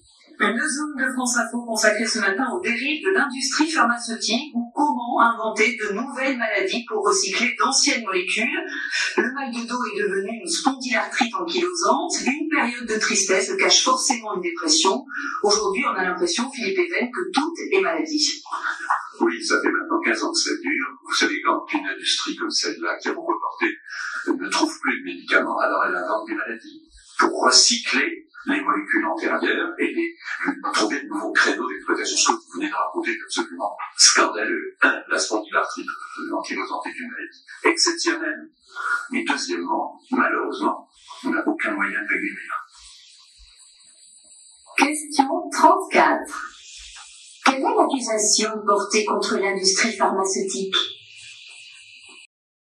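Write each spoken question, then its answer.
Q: Quelle est l'accusation portée contre l'industrie pharmaceutique ?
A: Elle invente de nouvelles maladies pour recycler d'anciennes molécules.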